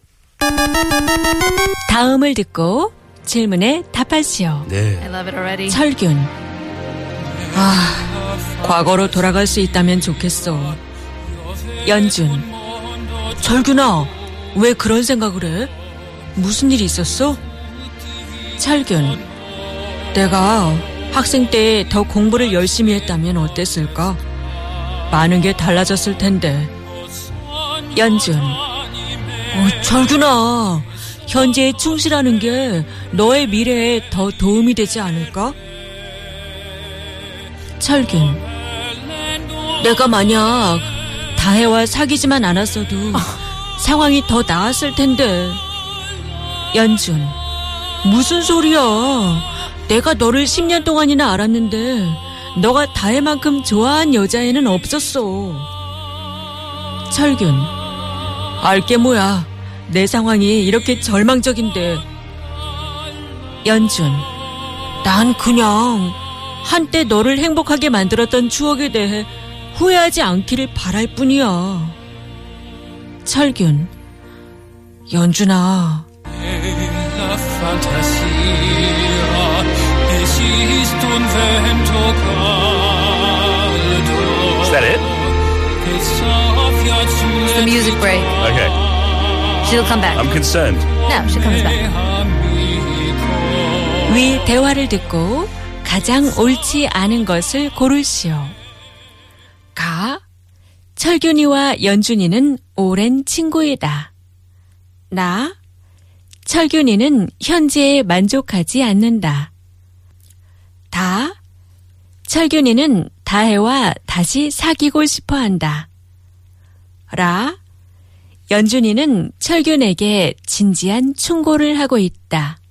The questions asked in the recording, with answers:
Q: 위 대화를 듣고 가장 옳지 않은 것을 고르시오.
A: 다 철균이는 다혜와 다시 사귀고 싶어한다.